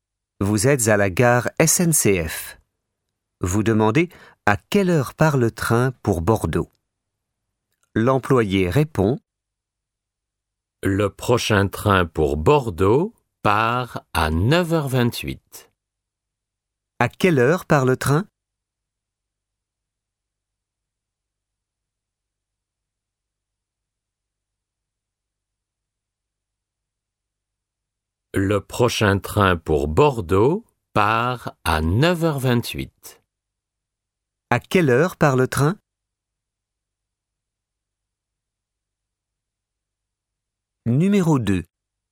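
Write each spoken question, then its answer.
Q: À quelle heure part le train?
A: À 9h28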